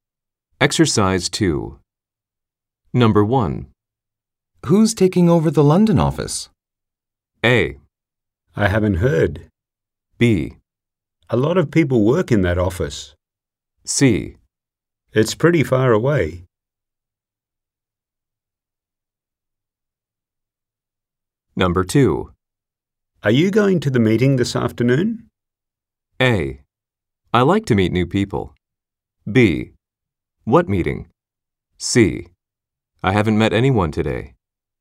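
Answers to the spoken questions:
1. A: I haven't heard.
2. B: What meeting?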